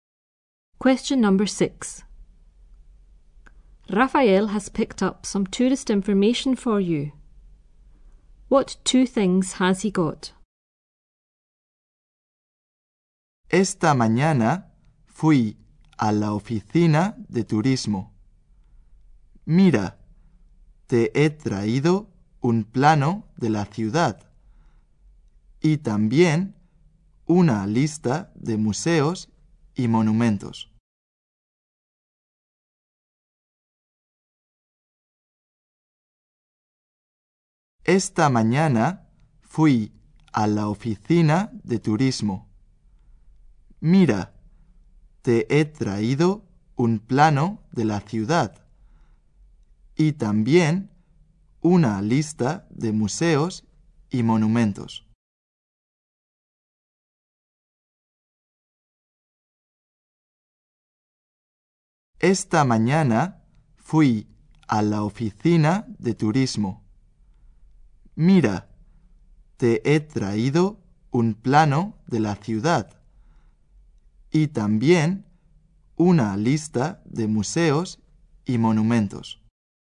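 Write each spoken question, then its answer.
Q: What 2 things has he got?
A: A map of the town and a list of museums and monuments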